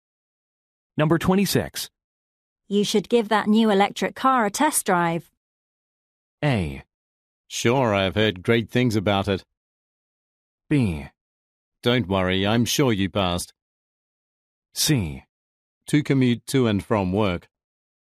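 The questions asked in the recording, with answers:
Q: You should give that new electric car a test drive.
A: A: Sure, I've heard great things about it.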